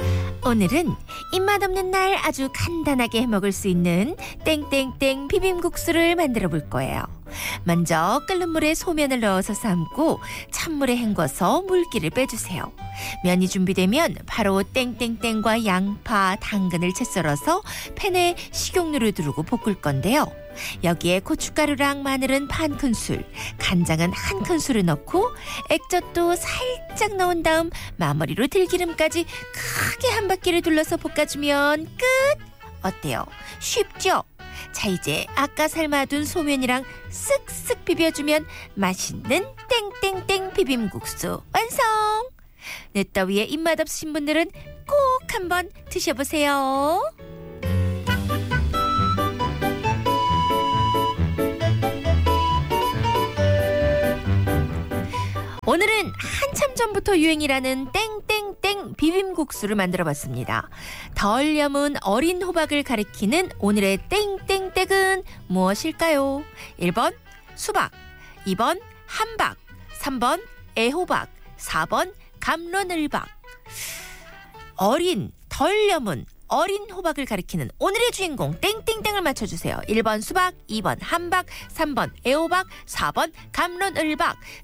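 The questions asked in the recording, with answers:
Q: 덜 염은 어린 호박을 가리키는 오늘의 땡땡땡은 무엇일까요?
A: 3: 애호박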